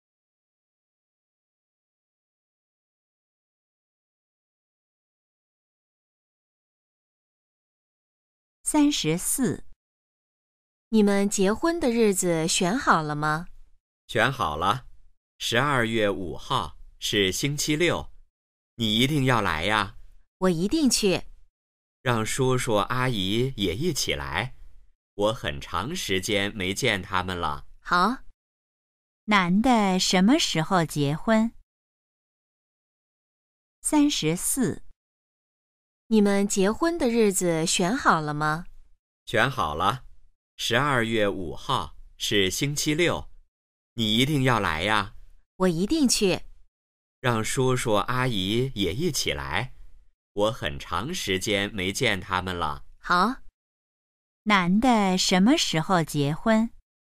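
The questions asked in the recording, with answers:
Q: 男的什么时候结婚?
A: 12月5号(星期六)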